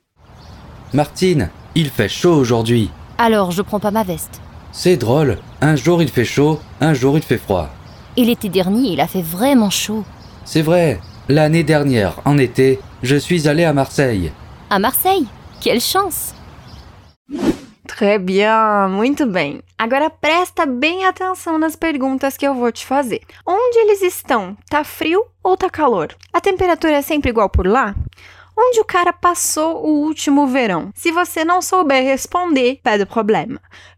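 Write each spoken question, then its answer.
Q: Tá frio ou tá calor?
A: Tá calor

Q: A temperatura é sempre igual por lá?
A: Não, um dia faz calor, outro dia faz frio

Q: Onde o cara passou o último verão?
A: Em Marseille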